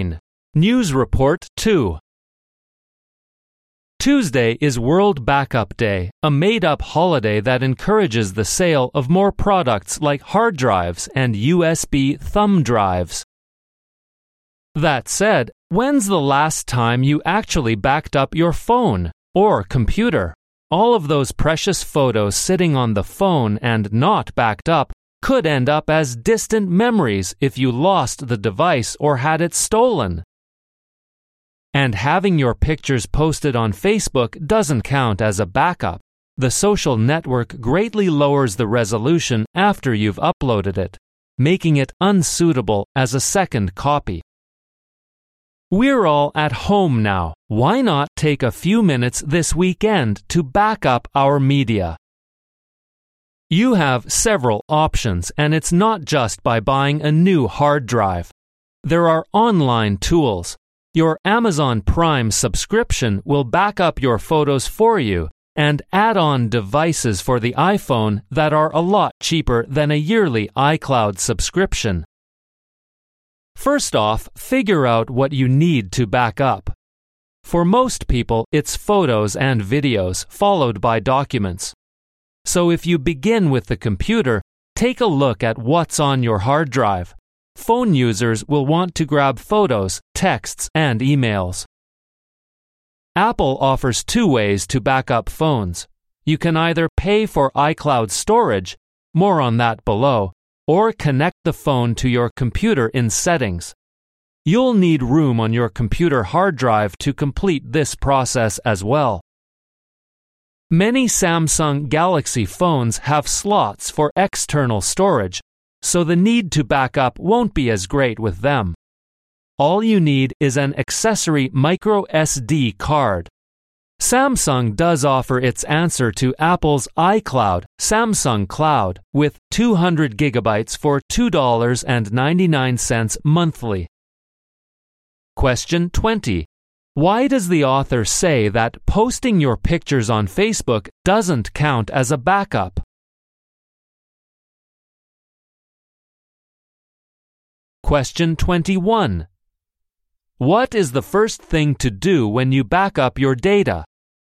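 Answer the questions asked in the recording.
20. Facebook greatly lowers the resolution of uploaded photos, so they are unsuitable as a second copy.
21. Figure out what you need to back up.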